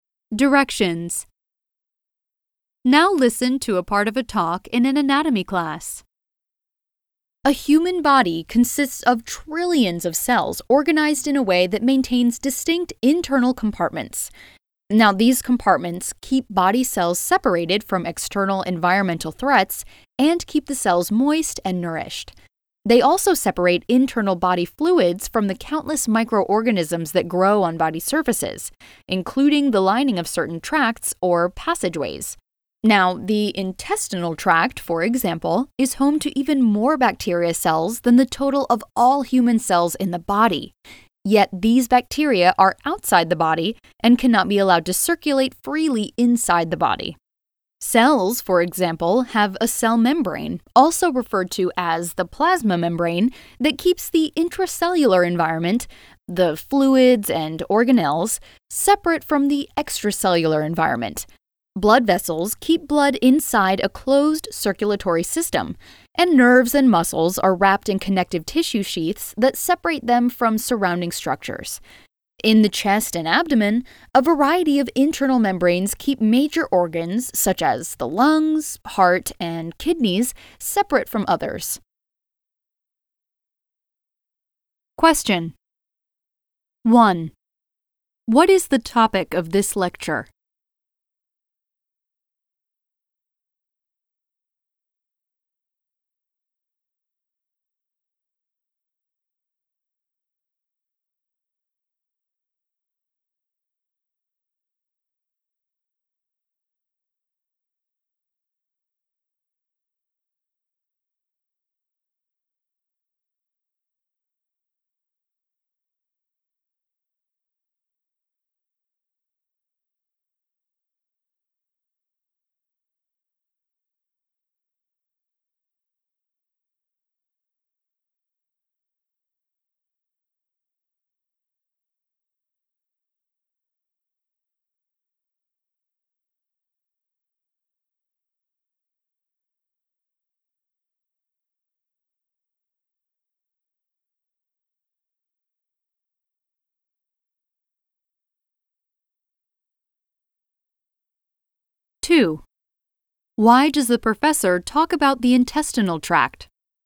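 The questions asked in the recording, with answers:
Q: What is the topic of this lecture?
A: How the body is organized into separate internal compartments that keep cells apart from outside threats

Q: Why does the professor talk about the intestinal tract?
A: To show that it holds many bacteria that are outside the body and must be kept from moving freely inside it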